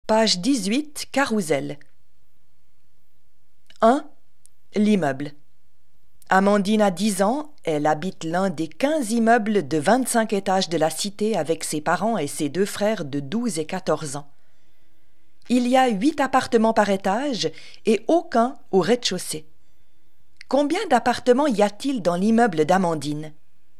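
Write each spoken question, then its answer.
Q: Combien d'appartements y a-t-il dans l'immeuble d'Amandine?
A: 200 appartements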